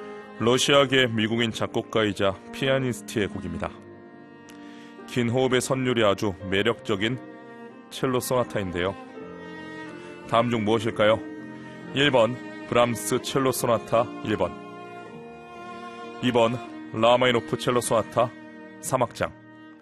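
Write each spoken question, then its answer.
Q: 다음 중 무엇일까요?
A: 2번: 라마이노프 첼로 소나타 3악장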